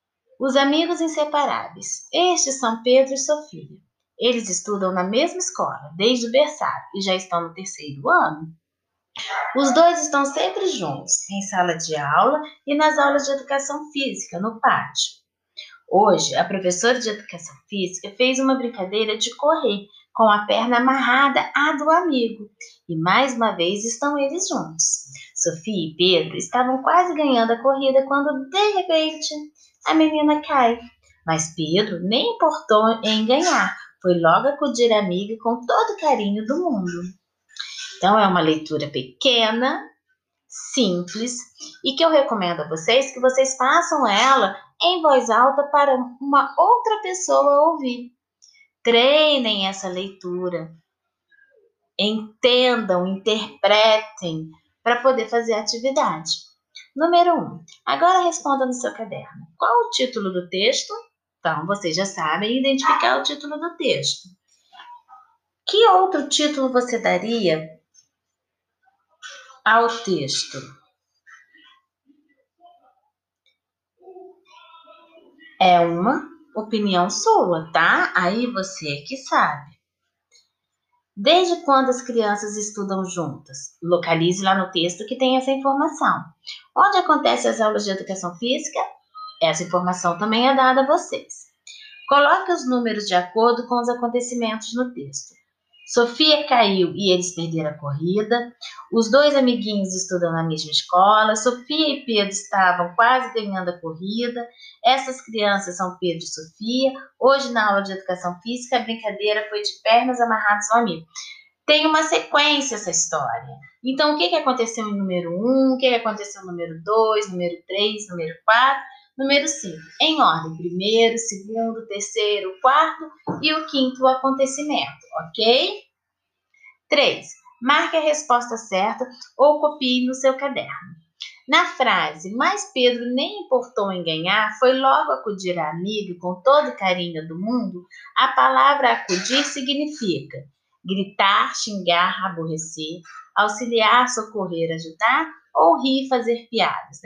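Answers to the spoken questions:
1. Os amigos inseparáveis
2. Desde o berçário
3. No pátio
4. ele socorreu, ele acudiu, ele auxiliou, ajudou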